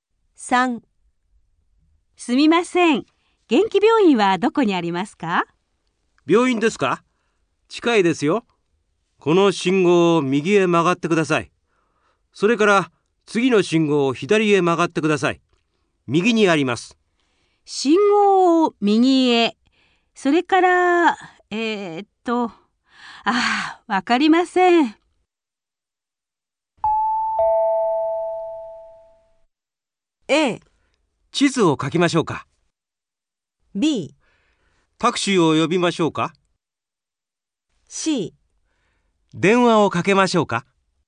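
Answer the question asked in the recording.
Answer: A: 地図を書きましょうか。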